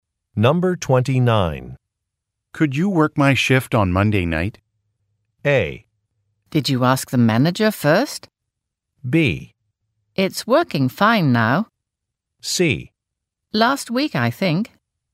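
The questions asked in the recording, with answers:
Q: Could you work my shift on Monday night?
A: A: Did you ask the manager first?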